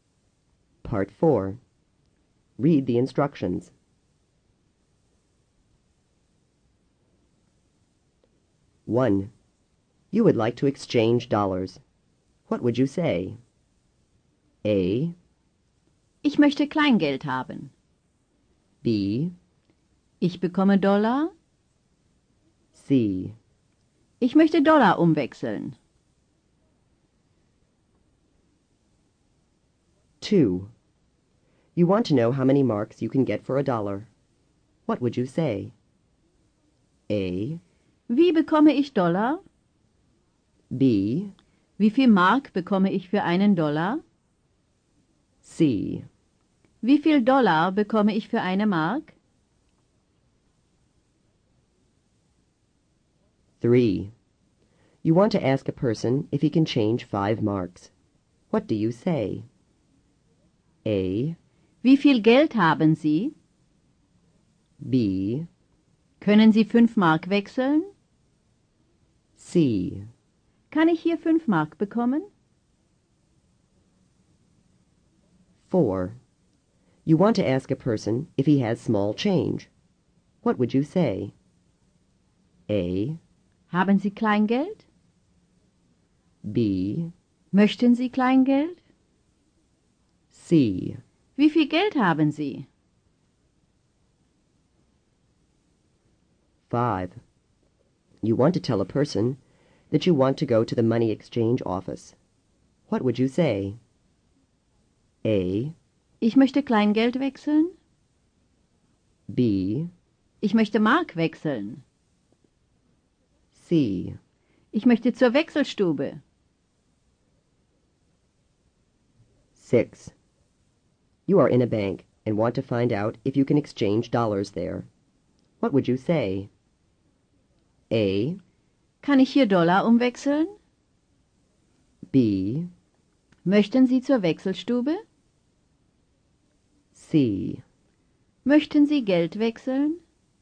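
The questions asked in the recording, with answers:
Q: You would like to exchange dollars. What would you say?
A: C: Ich möchte Dollar umwechseln.

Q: You want to know how many marks you can get for a dollar. What would you say?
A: B: Wie viel Mark bekomme ich für einen Dollar?

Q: You want to ask a person if he can change 5 marks. What do you say?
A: B: Können Sie 5 Mark wechseln?

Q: You want to ask a person if he has small change. What would you say?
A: A: Haben Sie Kleingeld?

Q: You want to tell a person that you want to go to the money exchange office. What would you say?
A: C: Ich möchte zur Wechselstube.

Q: You are in a bank and want to find out if you can exchange dollars there. What would you say?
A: A: Kann ich hier Dollar umwechseln?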